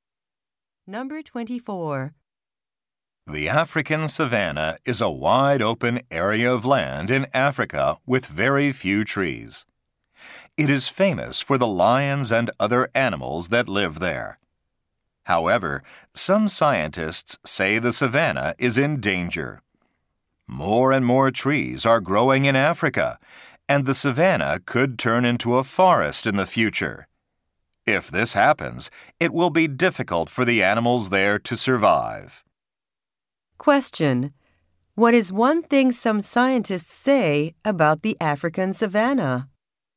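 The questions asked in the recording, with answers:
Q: What is one thing some scientists say about the African savanna?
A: It could turn into a forest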